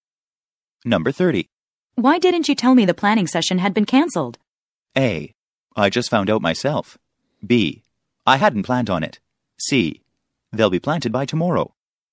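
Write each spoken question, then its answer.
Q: Why didn't you tell me the planning session had been cancelled?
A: A: I just found out myself.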